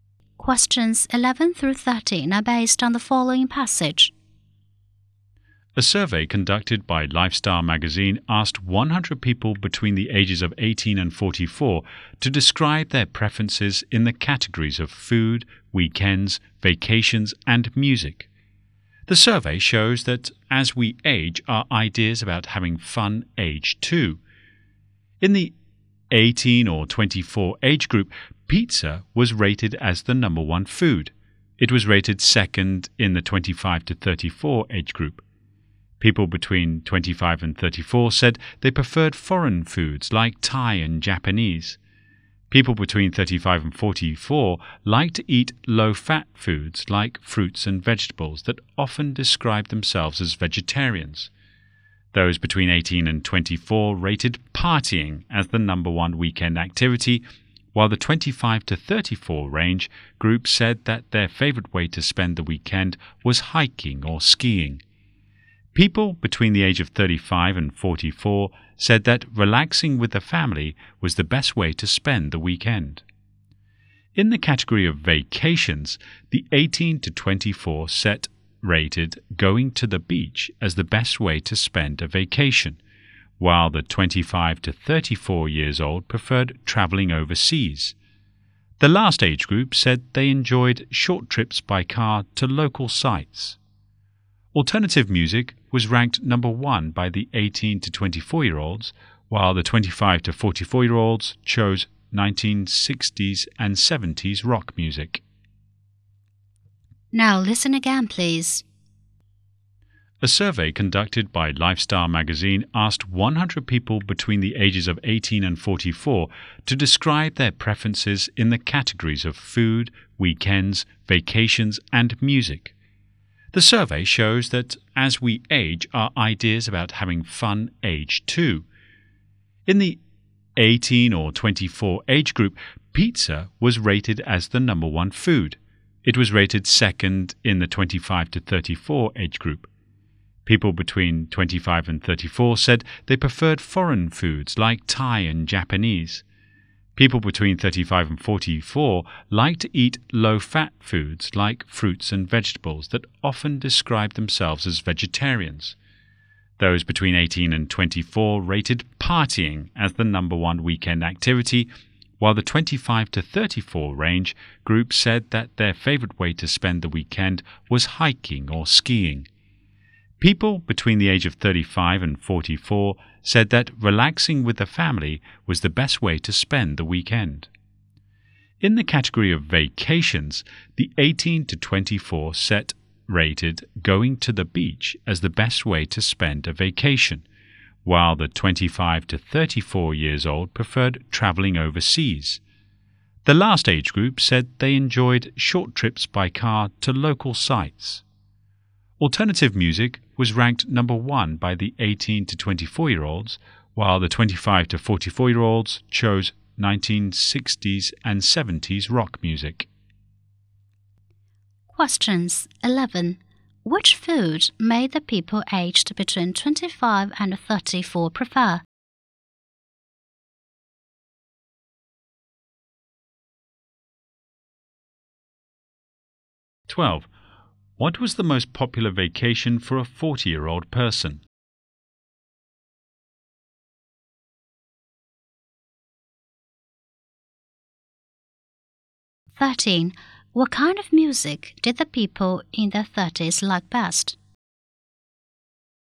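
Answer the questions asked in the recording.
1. Foreign foods like Thai and Japanese
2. Short trips by car to local sites
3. 1960s and 70s rock music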